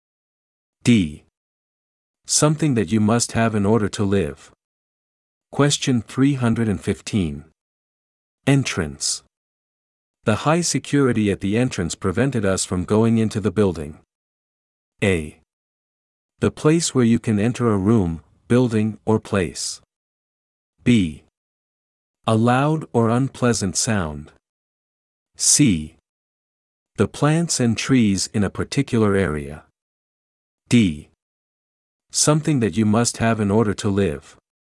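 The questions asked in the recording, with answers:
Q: Entrance. The high security at the entrance prevented us from going into the building.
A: A: The place where you can enter a room, building, or place.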